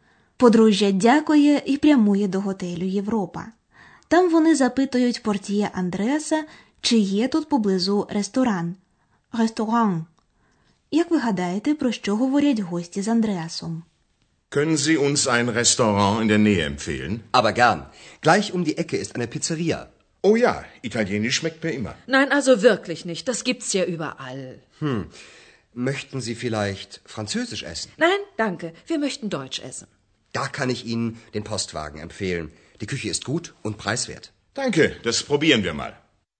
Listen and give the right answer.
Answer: У розмові йдеться про те, чи полюбляють гості італійську, французьку чи німецьку кухню.